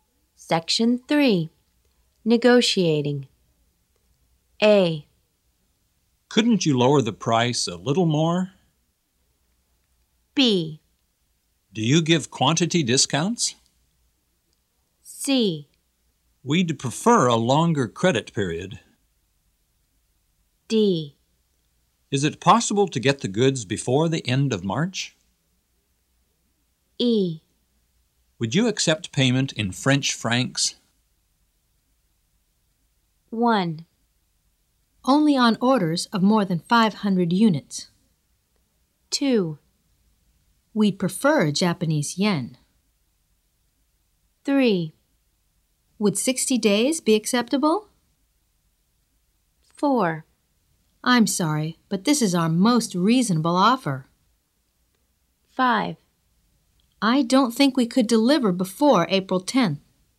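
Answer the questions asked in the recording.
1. B: Do you give quantity discounts?
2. E: Would you accept payment in French francs?
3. C: We'd prefer a longer credit period.
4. A: Couldn't you lower the price a little more?
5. D: Is it possible to get the goods before the end of March?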